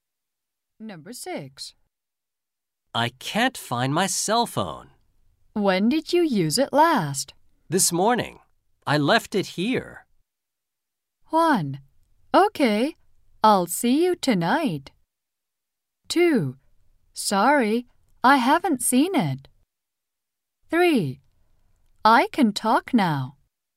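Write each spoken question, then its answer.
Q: This morning. I left it here.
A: 2: Sorry, I haven't seen it.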